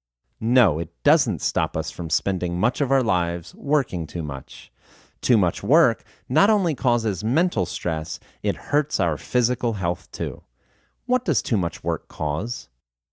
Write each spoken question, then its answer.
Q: What does too much work cause?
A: Too much work causes mental stress.